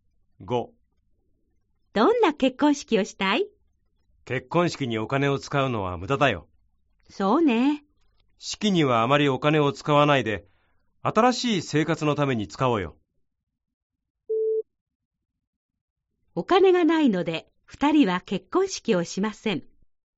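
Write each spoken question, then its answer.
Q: お金がないので、二人は結婚式をしません。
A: ×(結婚式にあまりお金を使わないだけ)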